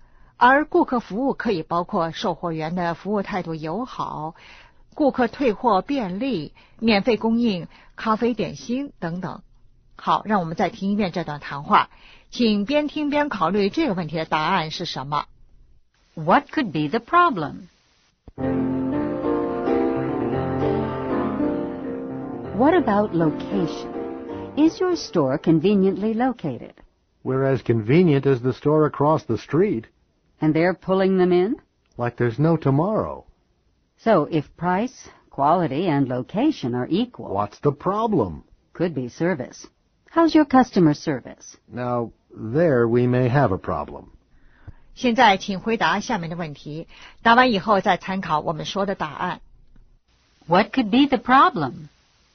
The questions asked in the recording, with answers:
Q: What could be the problem?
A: Customer service.